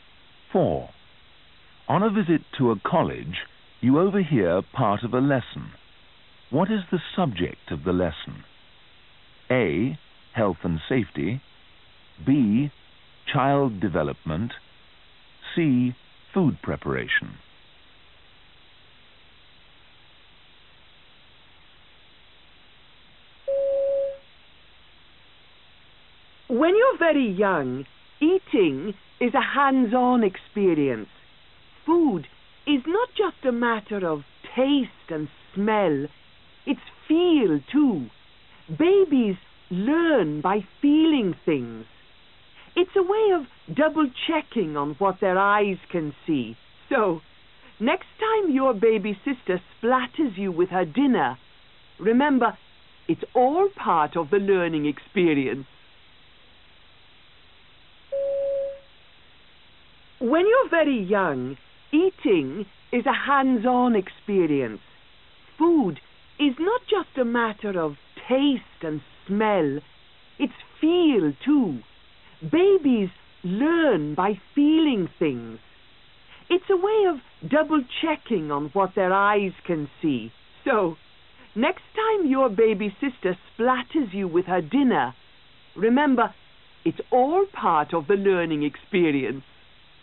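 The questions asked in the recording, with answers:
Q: What is the subject of the lesson?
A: B: Child development.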